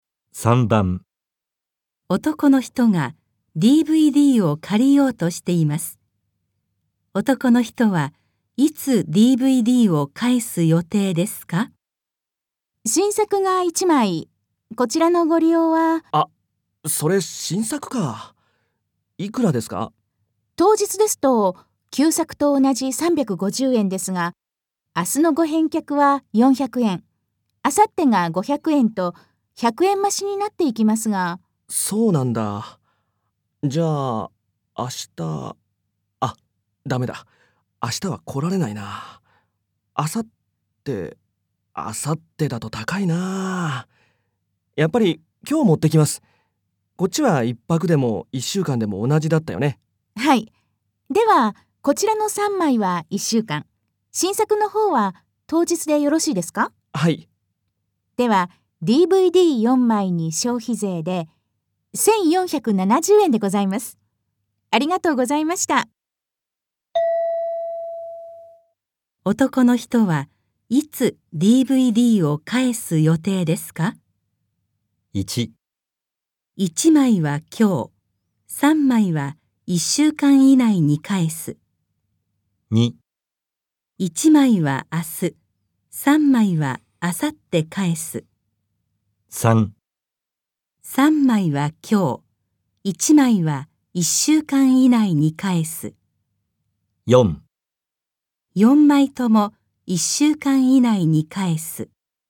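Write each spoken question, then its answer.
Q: 男の人はいつ DVD を返す予定ですか?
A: 1: 1枚は今日、3枚は1週間以内に返す。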